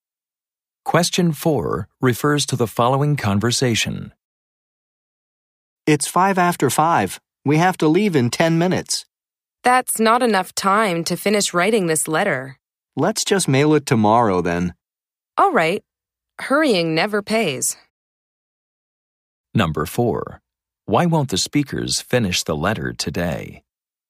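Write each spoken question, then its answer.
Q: Why won't the speakers finish the letter today?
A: There isn't enough time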